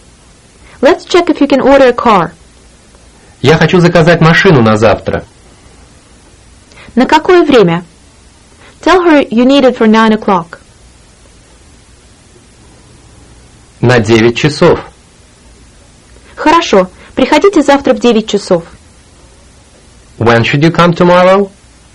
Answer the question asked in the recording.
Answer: At 9 o'clock. В 9 часов.